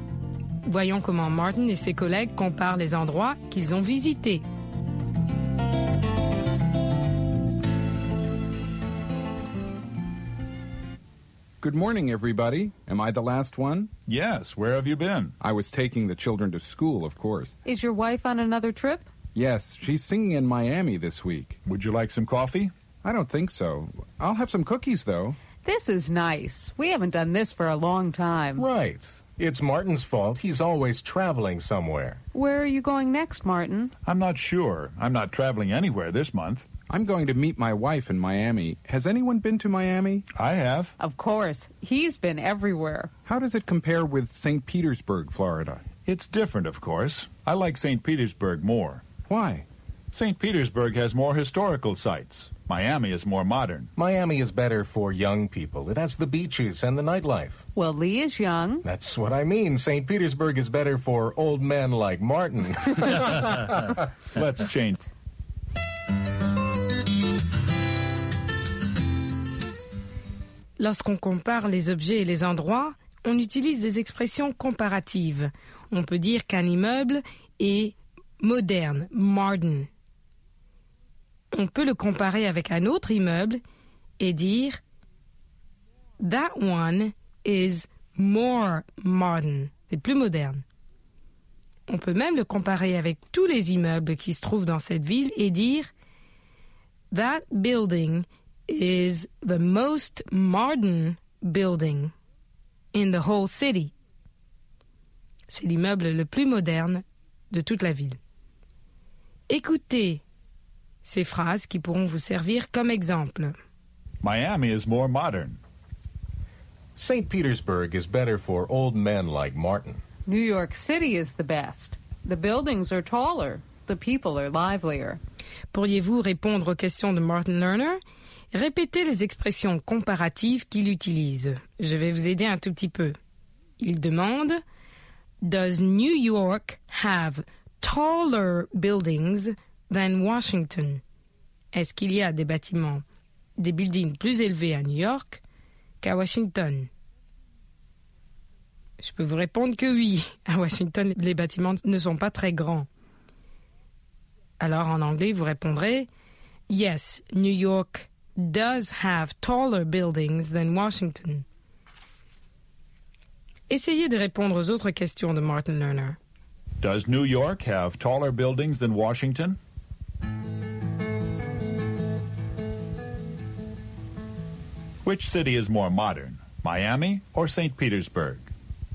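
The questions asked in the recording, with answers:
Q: Which city is more modern, Miami or St. Petersburg?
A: Miami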